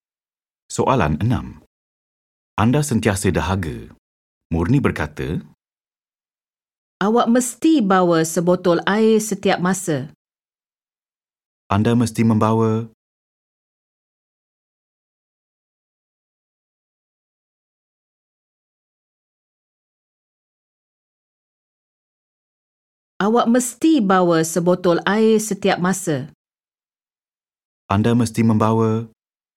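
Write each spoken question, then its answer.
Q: Anda mesti membawa.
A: sebotol air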